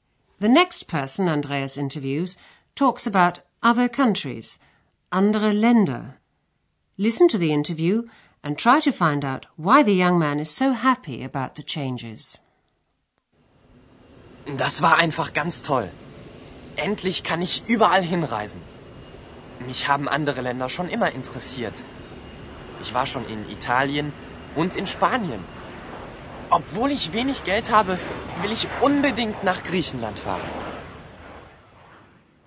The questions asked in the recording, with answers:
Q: Listen to the interview and try to find out why the young man is so happy about the changes.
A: He's happy because at long last he's free to travel anywhere.